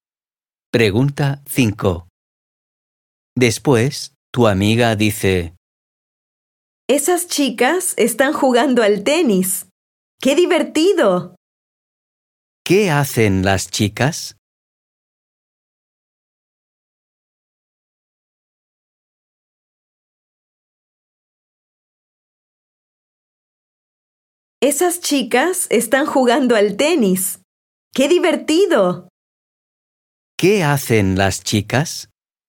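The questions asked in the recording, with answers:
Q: ¿Qué hacen las chicas?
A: juegan al tenis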